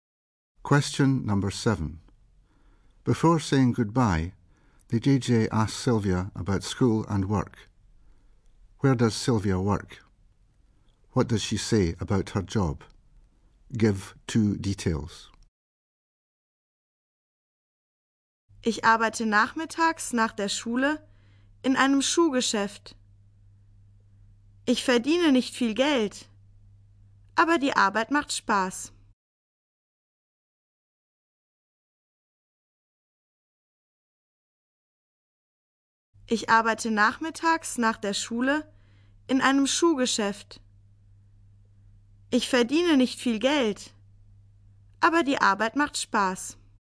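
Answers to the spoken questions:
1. In a shoe shop (afternoons after school)
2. She doesn't earn much money, but the work is fun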